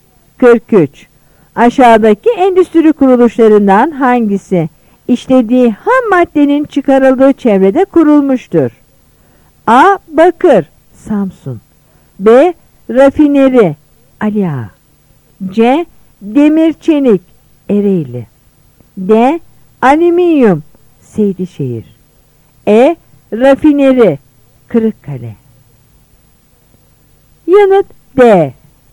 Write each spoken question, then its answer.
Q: Aşağıdaki endüstri kuruluşlarından hangisi işlediği ham maddenin çıkarıldığı çevrede kurulmuştur?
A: Yanıt D.